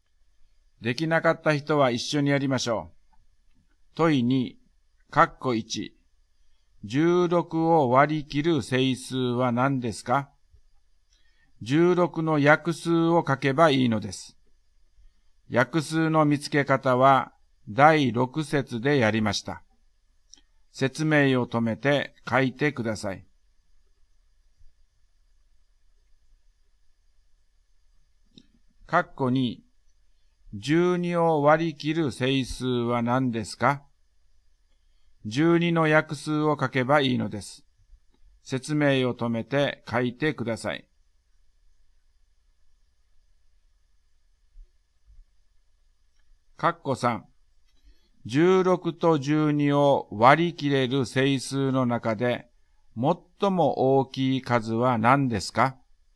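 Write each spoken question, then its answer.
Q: 16を割り切る整数は何ですか?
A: 1、2、4、8、16

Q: 12を割り切る整数は何ですか?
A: 1、2、3、4、6、12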